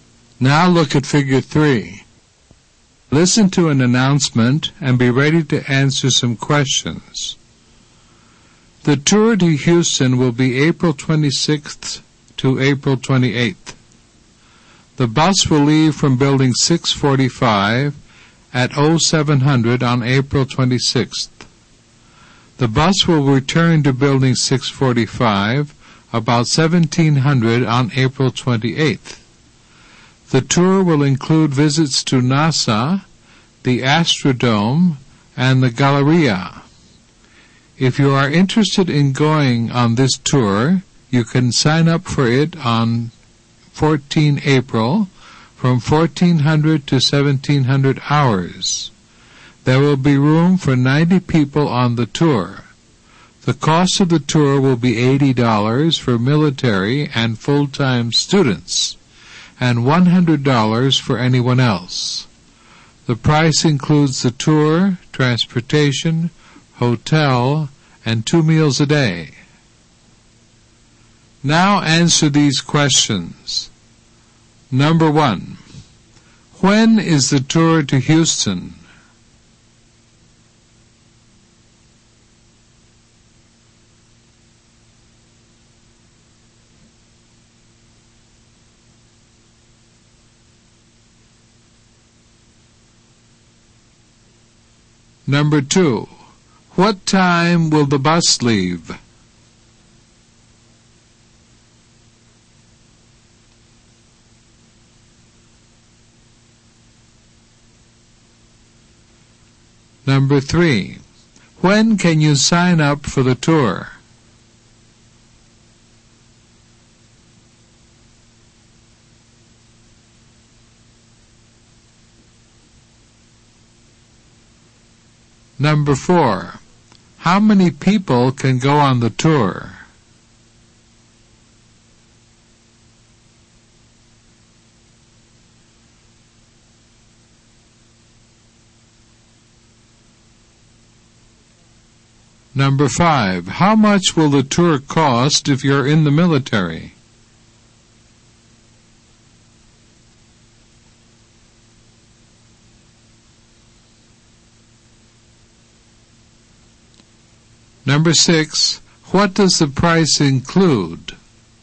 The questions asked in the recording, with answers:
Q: When is the tour to Houston?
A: April 26th to April 28th.

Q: What time will the bus leave?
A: At 0700.

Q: When can you sign up for the tour?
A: On April 14th from 1400 to 1700.

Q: How many people can go on the tour?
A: 90.

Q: How much will the tour cost if you're in the military?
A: $80.

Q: what does the price include?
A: It includes the tour, transportation, hotel, and two meals a day.